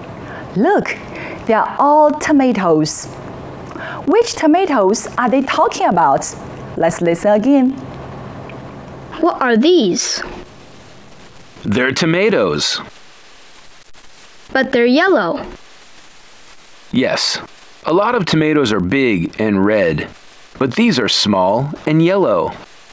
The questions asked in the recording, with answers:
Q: Which tomatoes are they talking about?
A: they're talking about the small and yellow tomatoes.